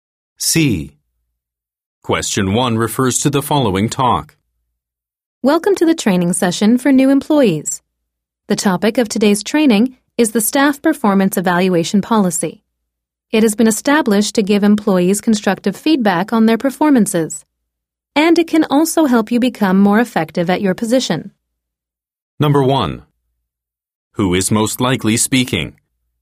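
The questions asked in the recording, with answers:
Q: Who is most likely speaking?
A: A trainer running training for new employees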